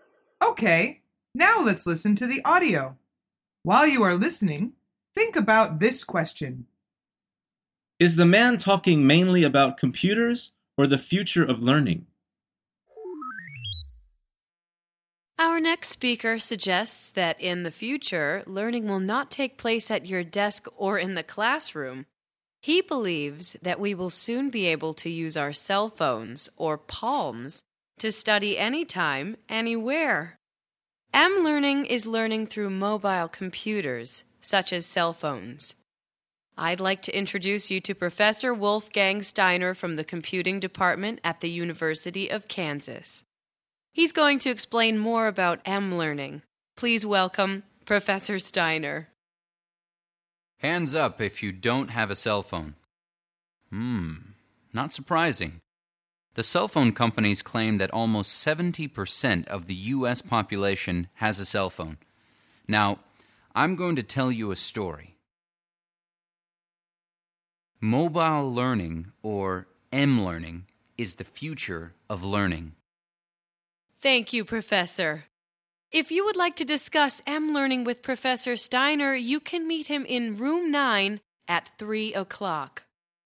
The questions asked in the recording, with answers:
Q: Is the man talking mainly about computers or the future of learning?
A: The answer is he is talking mainly about the future of learning.